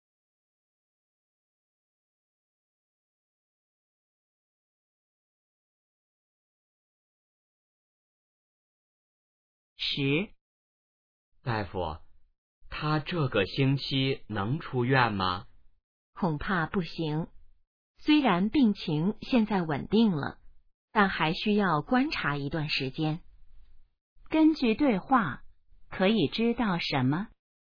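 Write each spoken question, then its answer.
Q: 根据对话,可以知道什么?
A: 病人这个星期还不能出院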